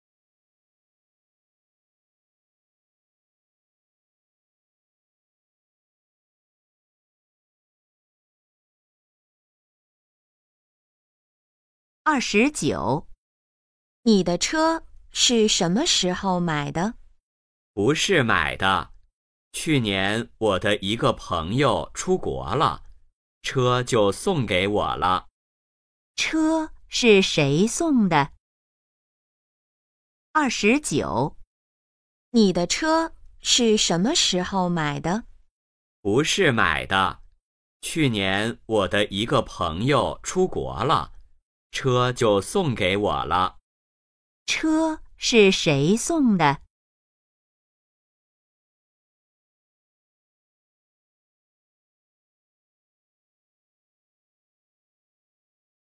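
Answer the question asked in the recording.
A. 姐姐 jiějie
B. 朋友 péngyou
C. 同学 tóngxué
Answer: B. 朋友 péngyou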